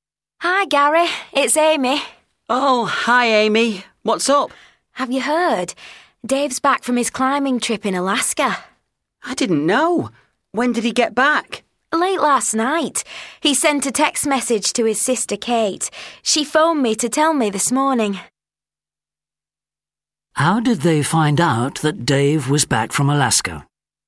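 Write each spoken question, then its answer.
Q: How did they find out that Dave was back from Alaska?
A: Dave's sister Kate phoned (after a text from Dave)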